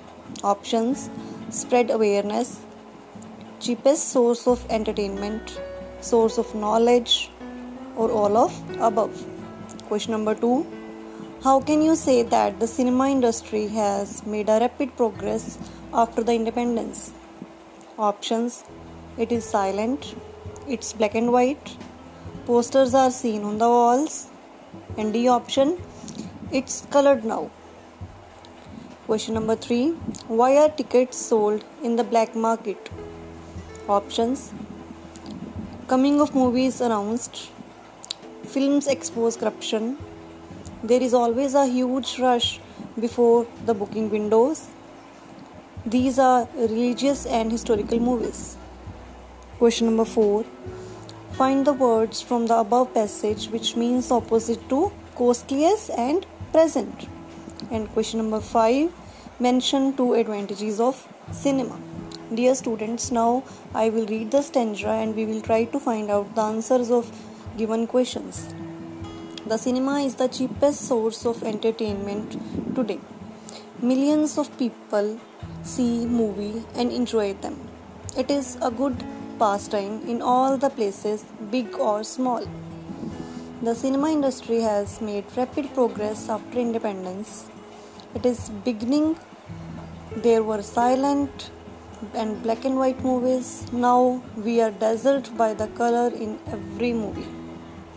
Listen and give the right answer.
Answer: And the correct answer is option D. It's colored now.